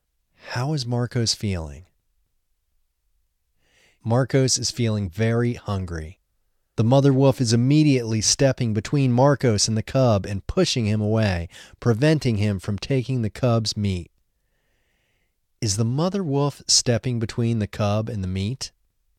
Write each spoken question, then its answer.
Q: Is the mother wolf stepping between the cub and the meat?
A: No, the mother wolf is stepping between the cub and Marcos.